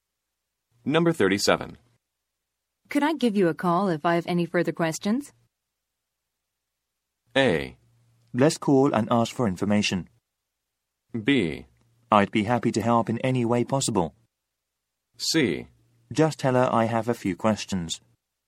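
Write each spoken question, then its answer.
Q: Could I give you a call if I have any further questions?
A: B: I'd be happy to help in any way possible.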